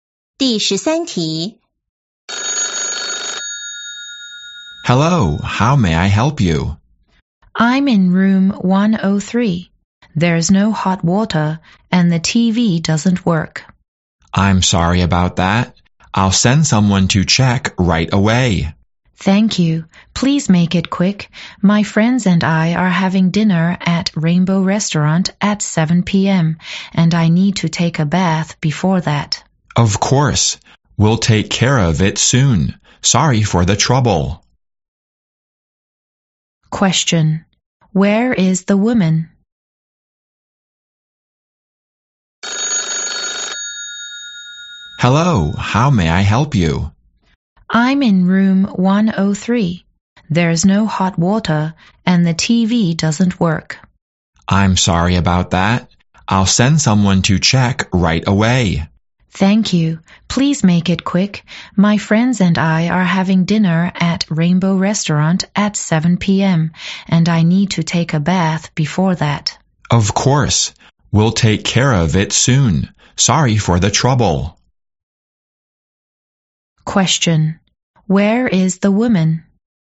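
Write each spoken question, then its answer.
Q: Where is the woman?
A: At a hotel (in room 103)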